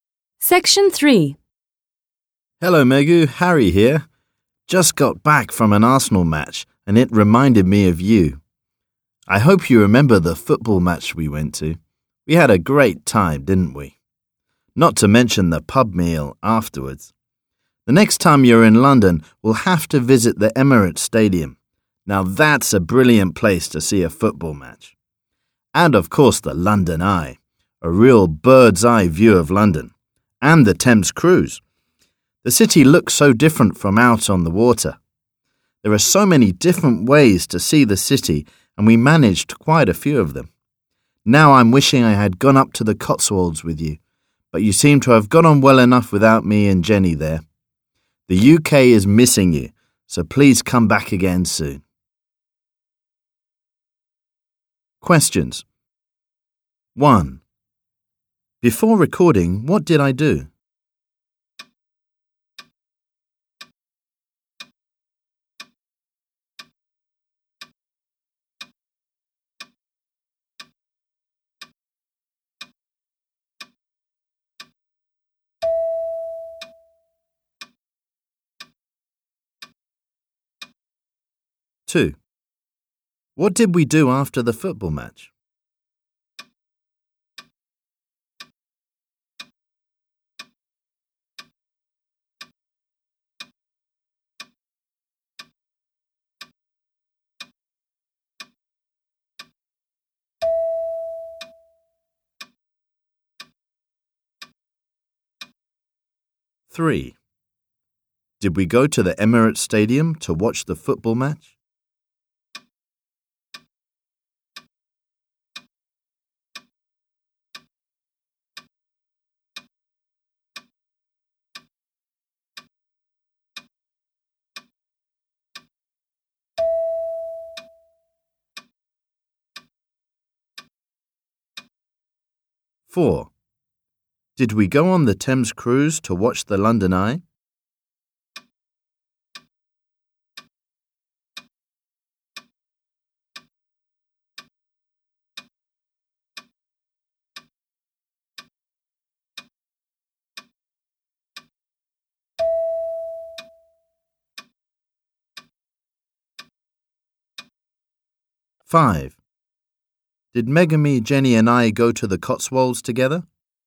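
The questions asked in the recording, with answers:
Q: Before recording, what did I do?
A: He went to an Arsenal football match.

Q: What did we do after the football match?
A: They had a pub meal.

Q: Did we go to the Emirates Stadium to watch the football match?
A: No, they will visit it next time.

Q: Five. Did Megami, Jenny, and I go to the Cotswolds together?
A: No, Megu went without Harry and Jenny.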